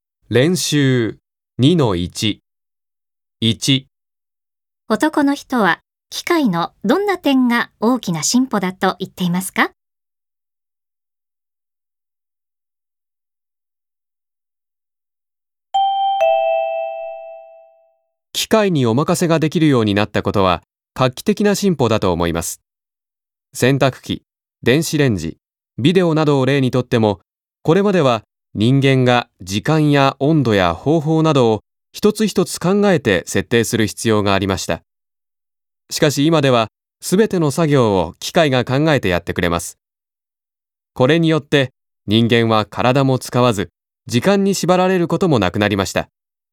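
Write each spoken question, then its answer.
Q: 男の人は機械のどんな点が大きな進歩だと言っていますか?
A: 機械にお任せができるようになったこと(すべての作業を機械が考えてやってくれる点)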